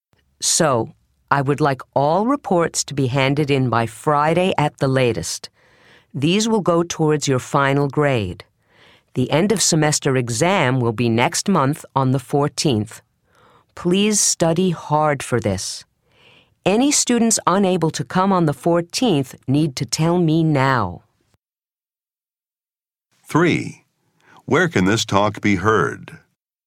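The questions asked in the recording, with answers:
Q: Where can this talk be heard?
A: In a classroom at a school or university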